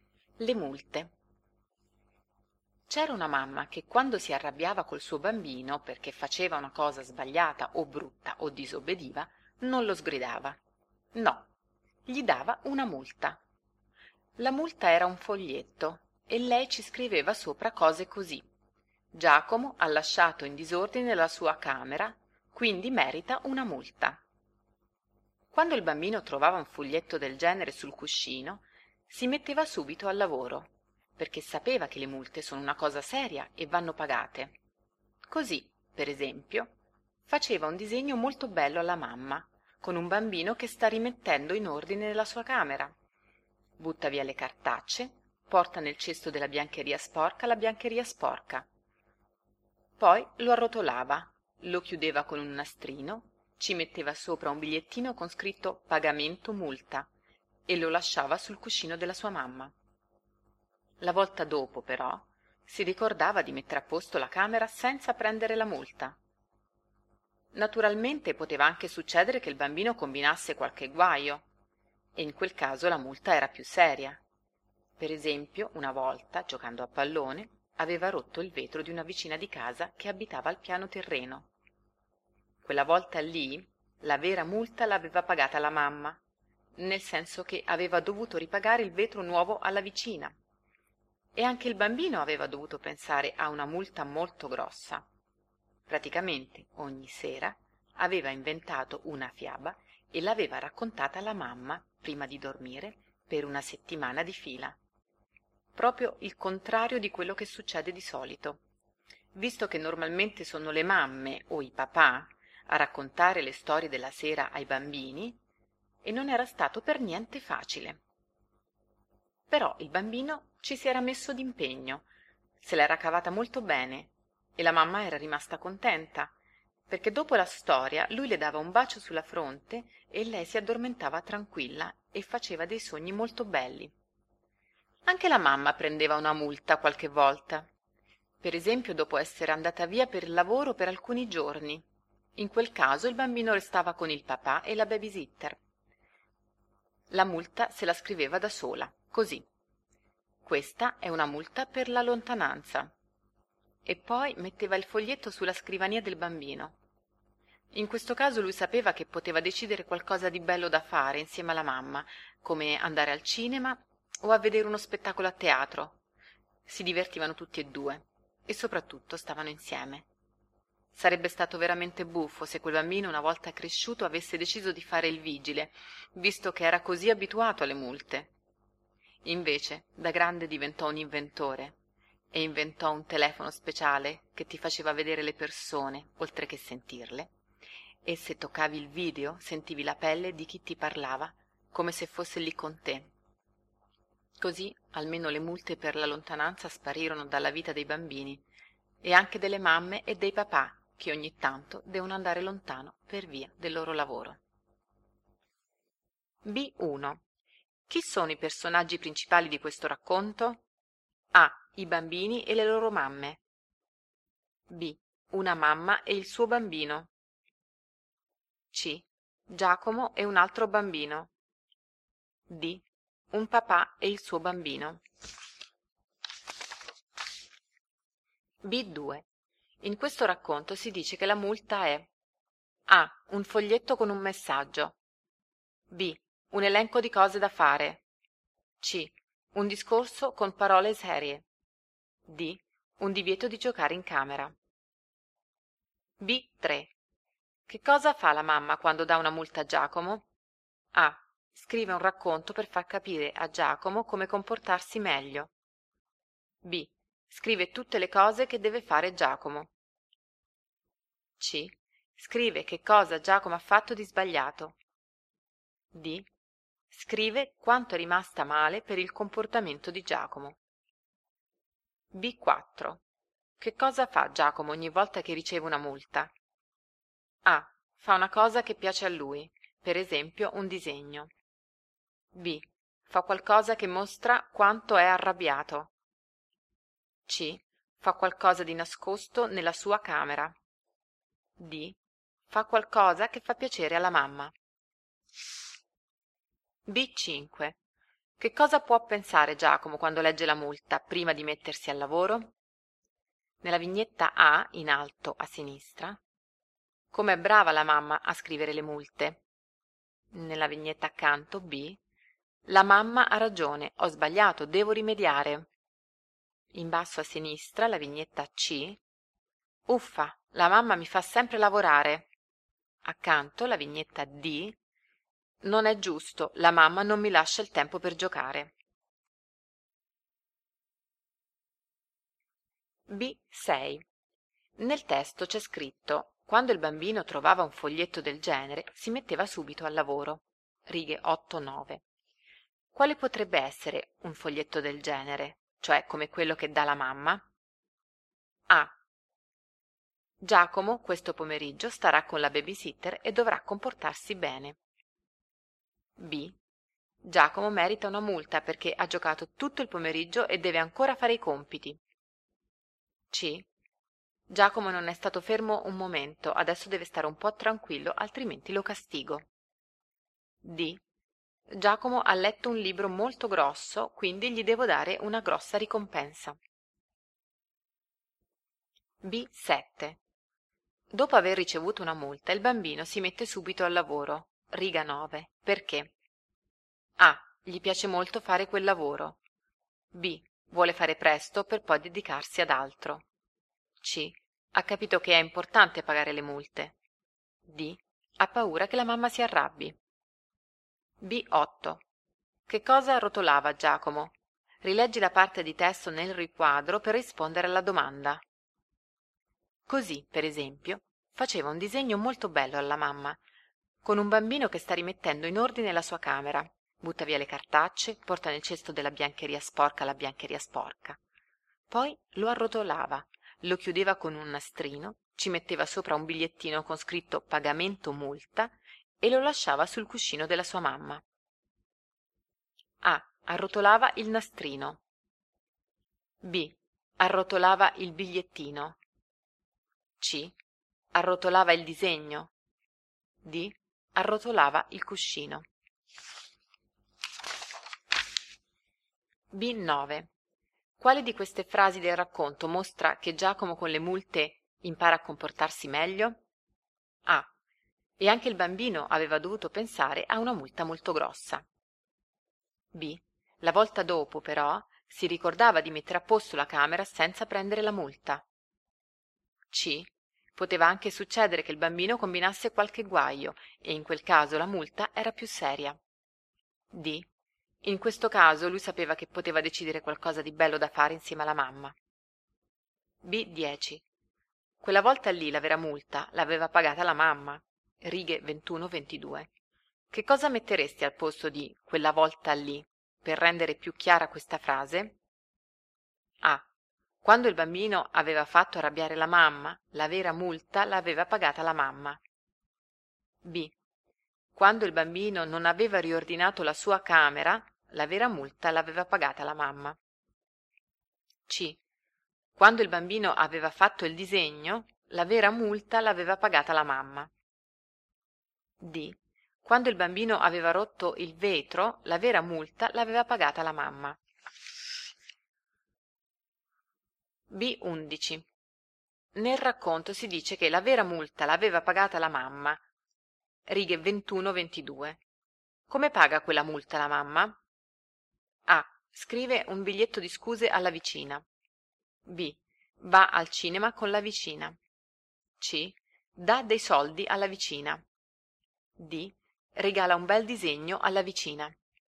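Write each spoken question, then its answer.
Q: Chi sono i personaggi principali di questo racconto?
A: B: Una mamma e il suo bambino.

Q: In questo racconto si dice che la multa è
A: A: Un foglietto con un messaggio.

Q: Che cosa fa la mamma quando dà una multa a Giacomo?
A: C: Scrive che cosa Giacomo ha fatto di sbagliato.

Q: Che cosa fa Giacomo ogni volta che riceve una multa?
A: D: Fa qualcosa che fa piacere alla mamma.

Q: Che cosa può pensare Giacomo quando legge la multa, prima di mettersi al lavoro?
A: B: la mamma ha ragione, ho sbagliato, devo rimediare.

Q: Quale potrebbe essere un foglietto del genere, cioè come quello che dà la mamma?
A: B: Giacomo merita una multa perché ha giocato tutto il pomeriggio e deve ancora fare i compiti.

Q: Perché?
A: C: Ha capito che è importante pagare le multe.

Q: Che cosa rotolava Giacomo?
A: C: Arrotolava il disegno.

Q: Quale di queste frasi del racconto mostra che Giacomo con le multe impara a comportarsi meglio?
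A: B: La volta dopo, però, si ricordava di mettere a posto la camera senza prendere la multa.

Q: Che cosa metteresti al posto di quella volta lì per rendere più chiara questa frase?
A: D: Quando il bambino aveva rotto il vetro, la vera multa l'aveva pagata la mamma.

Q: Come paga quella multa la mamma?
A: C: Dà dei soldi alla vicina.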